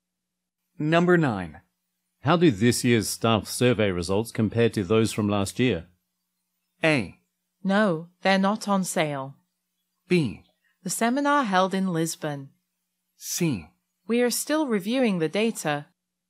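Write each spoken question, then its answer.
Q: How do this year's staff survey results compare to those from last year?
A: C: We are still reviewing the data.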